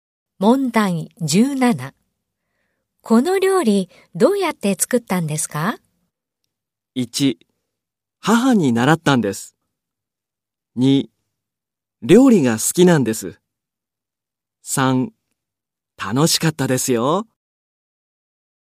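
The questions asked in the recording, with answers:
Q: この料理どうやって作ったんですか?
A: 3: 母に習ったんです。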